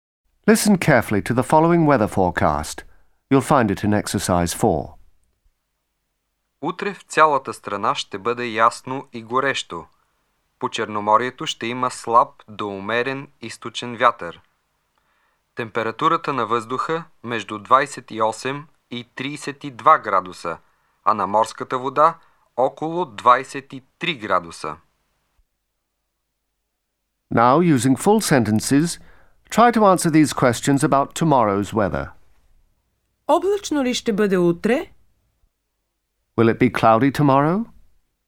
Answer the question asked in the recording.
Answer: Не, утре ще бъде ясно и горещо.